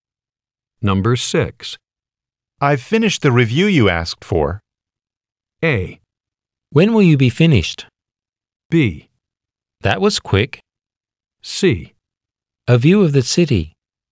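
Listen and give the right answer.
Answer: B: That was quick.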